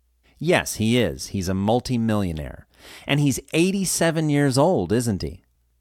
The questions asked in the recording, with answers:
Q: And he's 87 years old, isn't he?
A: No, he isn't. He's 97, not 87.